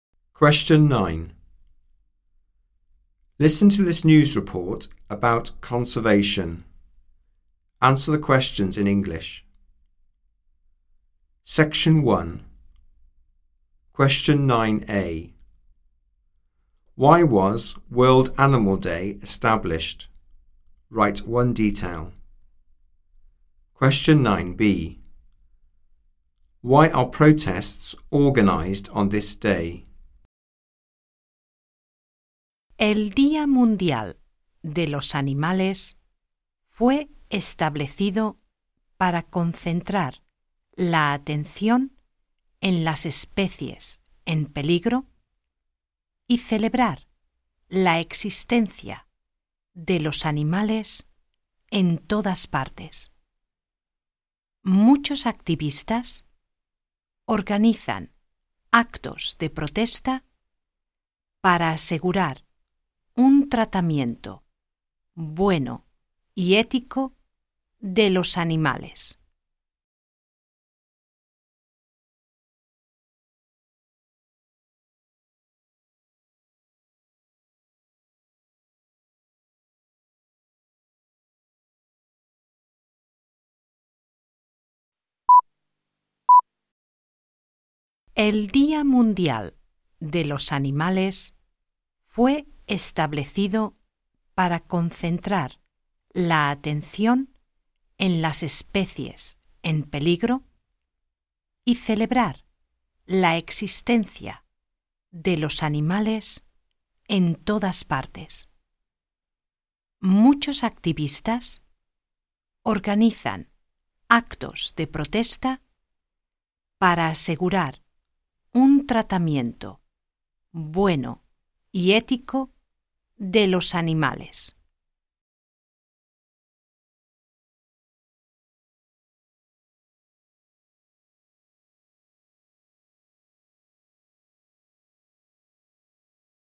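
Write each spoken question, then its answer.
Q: Why was World Animal Day established?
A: To focus attention on endangered species / celebrate animals everywhere

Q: Why are protests organized on this day?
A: To ensure good, ethical treatment of animals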